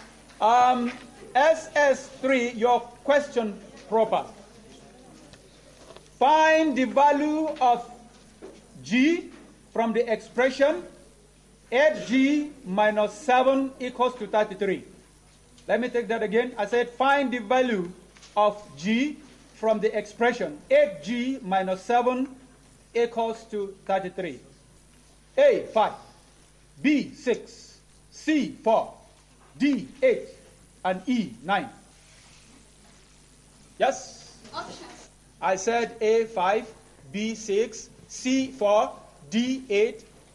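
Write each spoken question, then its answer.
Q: Find the value of G from the expression 8G minus 7 equals to 33.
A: A: 5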